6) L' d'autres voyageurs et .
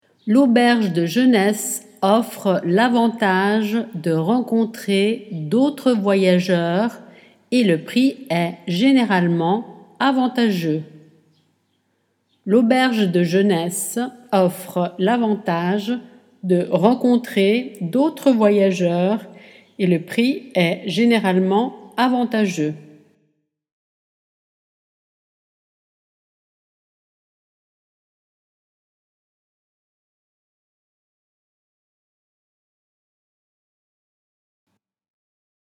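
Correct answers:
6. auberge de jeunesse offre l'avantage de rencontrer / le prix est généralement avantageux

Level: Dettato di francese A2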